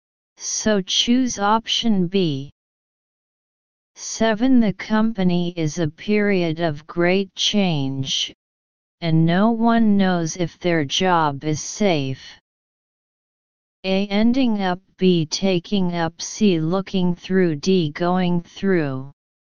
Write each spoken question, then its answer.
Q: The company is a period of great change, and no one knows if their job is safe.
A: Answer D.